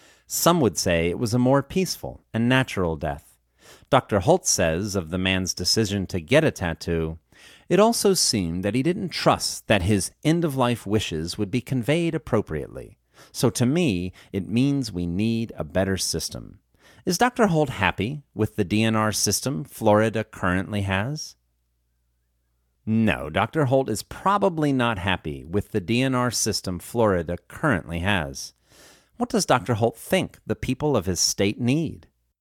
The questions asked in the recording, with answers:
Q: What does Dr. Holt think the people of his state need?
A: Dr. Holt thinks the people of his state need a better system.